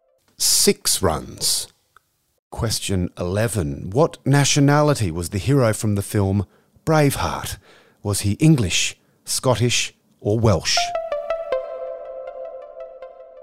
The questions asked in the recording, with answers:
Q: What nationality was the hero from the film Braveheart?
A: Scottish.